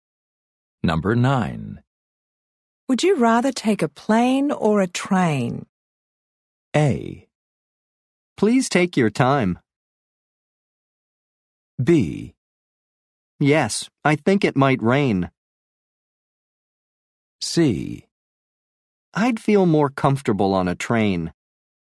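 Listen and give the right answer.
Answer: C: I'd feel more comfortable on a train.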